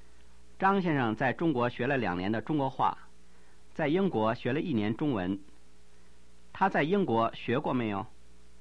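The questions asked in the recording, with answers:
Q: 他在英国学过没有?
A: 学过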